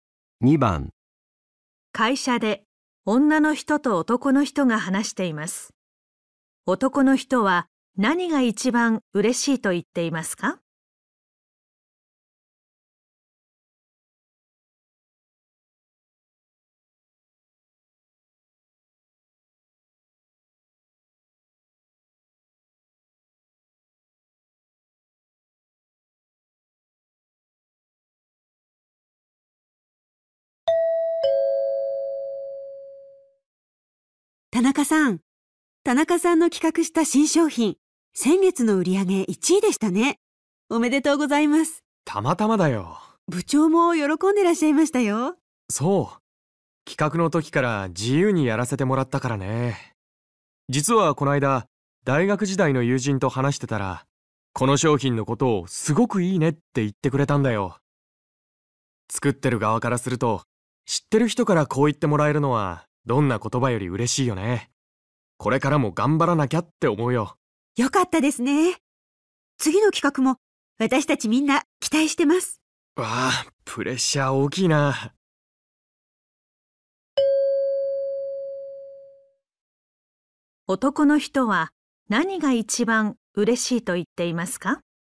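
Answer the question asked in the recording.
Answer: 知っている人(大学時代の友人)に商品をいいと言ってもらえたこと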